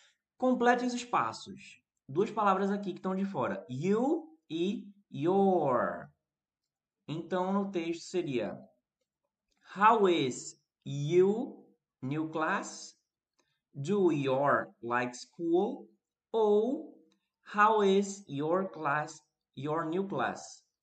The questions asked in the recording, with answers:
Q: Complete os espaços. Duas palavras aqui que estão de fora.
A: Your e depois you.